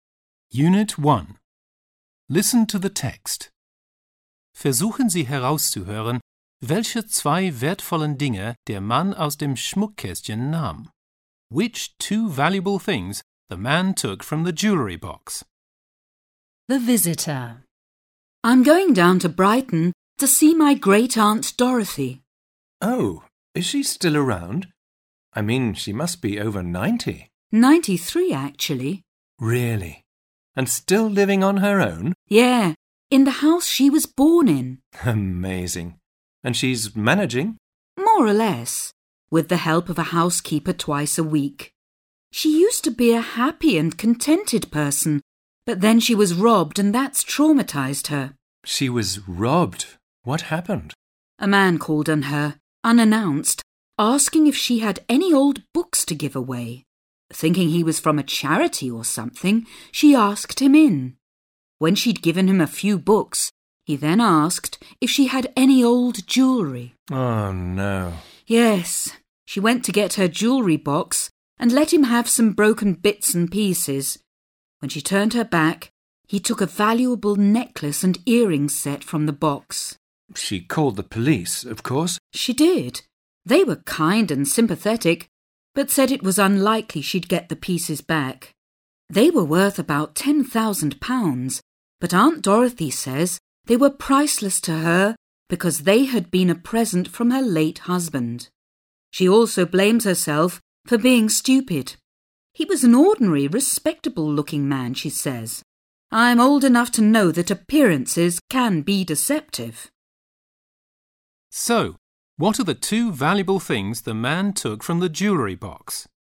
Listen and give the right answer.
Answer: A necklace and earrings set.